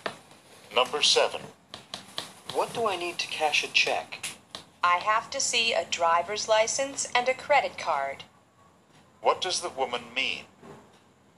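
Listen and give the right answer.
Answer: A driver's license and a credit card are needed to cash a check.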